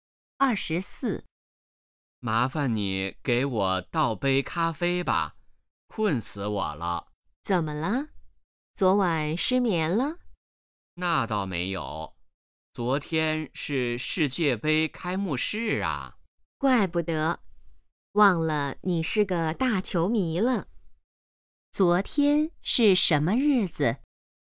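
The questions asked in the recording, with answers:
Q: 昨天是什么日子?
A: 世界杯开幕式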